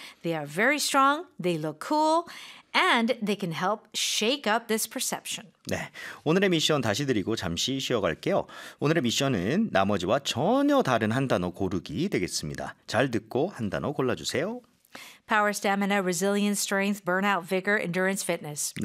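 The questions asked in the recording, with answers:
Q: 오늘의 미션은 나머지와 전혀 다른 한 단어 고르기 되겠습니다.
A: burnout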